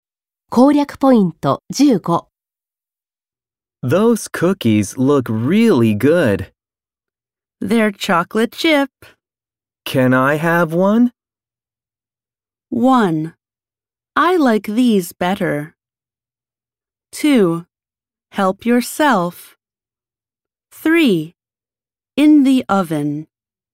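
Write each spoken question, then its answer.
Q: Can I have one?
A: 2: Help yourself.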